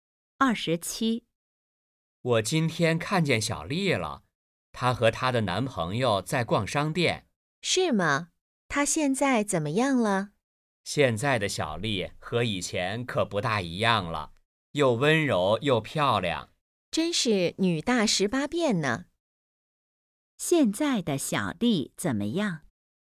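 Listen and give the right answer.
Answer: 又温柔又漂亮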